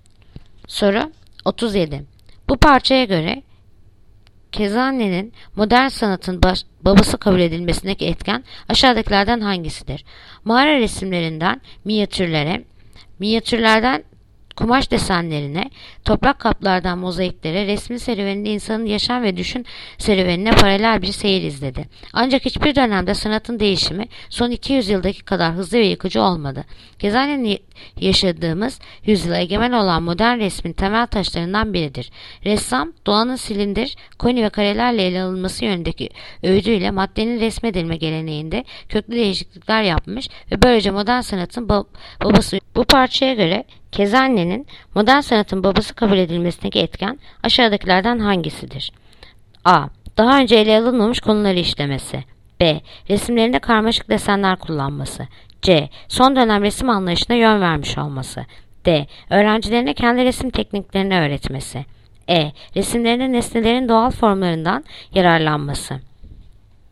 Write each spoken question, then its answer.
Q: Bu parçaya göre Kezanne'nin modern sanatın babası kabul edilmesindeki etken aşağıdakilerden hangisidir?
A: Yanıt: Ceyhan. Son dönem resim anlayışına yön vermiş olması.